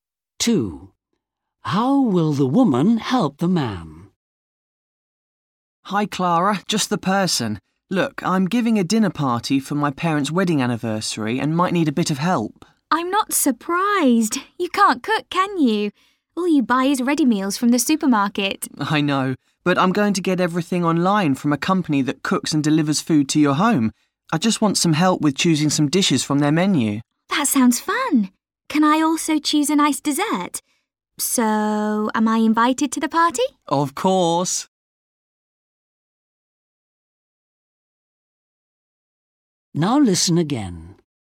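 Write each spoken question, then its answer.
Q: How will the woman help the man?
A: She will help him choose dishes from an online menu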